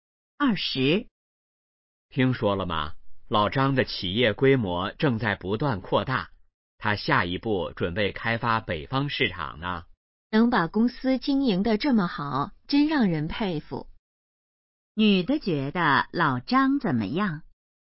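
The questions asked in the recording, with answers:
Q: 女的觉得老张怎么样?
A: 让人佩服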